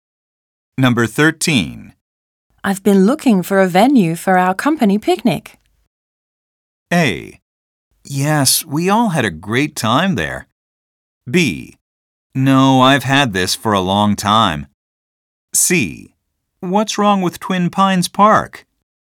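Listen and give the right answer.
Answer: C: What's wrong with Twin Pines Park?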